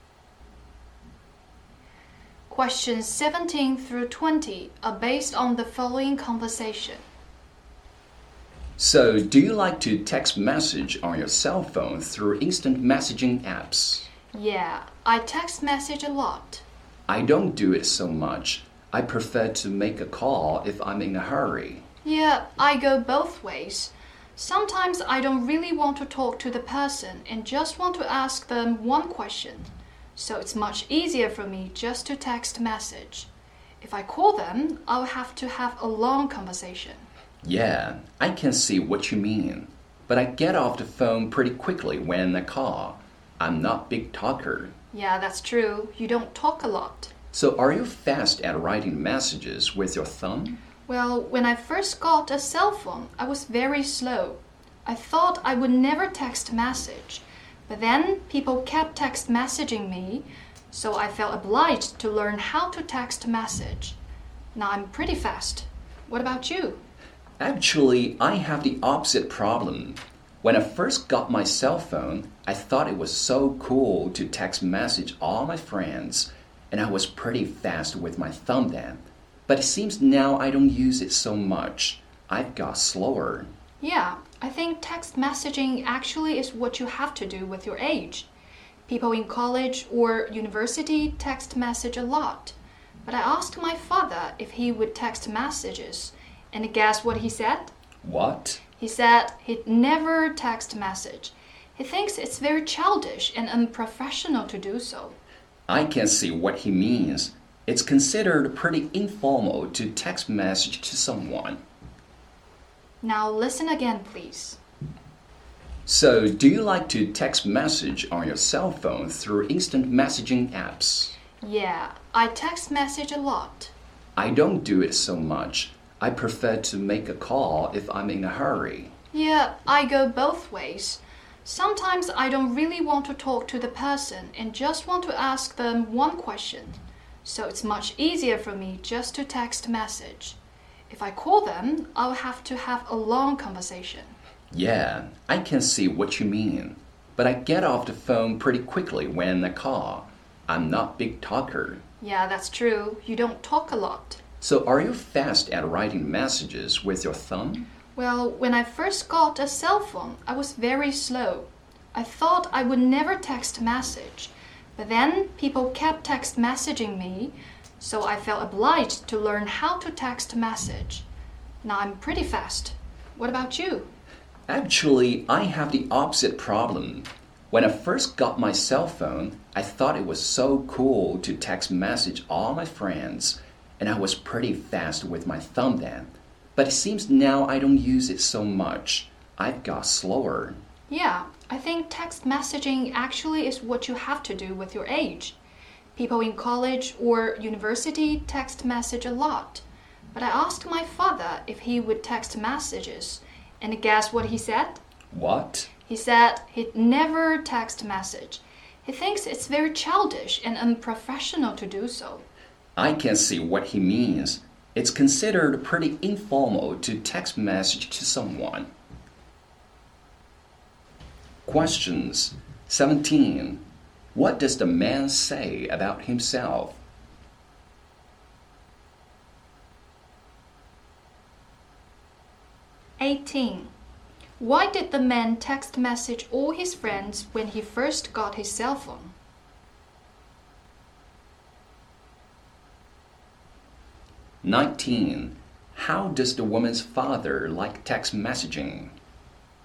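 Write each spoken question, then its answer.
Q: 19. How does the woman's father like text messaging?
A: He thinks it is childish and unprofessional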